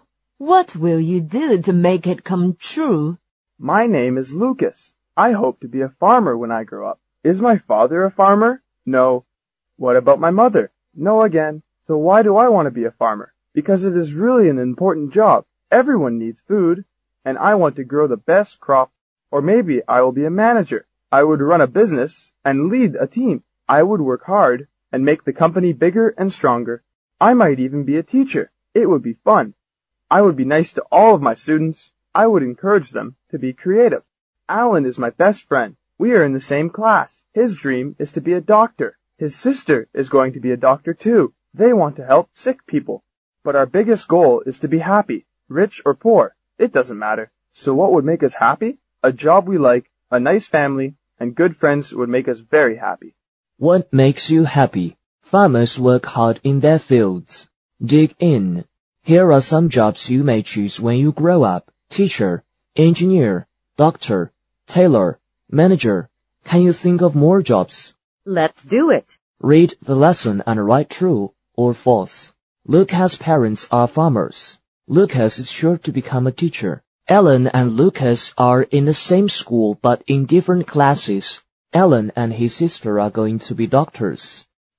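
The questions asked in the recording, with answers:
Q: Lucas' parents are farmers.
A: False

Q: Lucas is sure to become a teacher.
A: False

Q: Ellen and Lucas are in the same school but in different classes.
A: False

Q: Ellen and his sister are going to be doctors.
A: True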